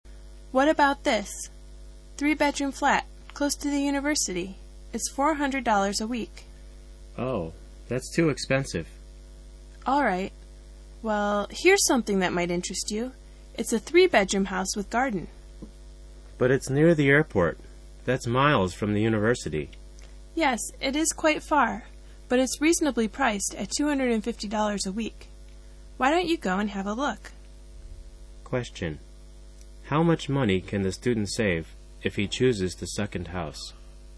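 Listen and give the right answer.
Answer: $150 a week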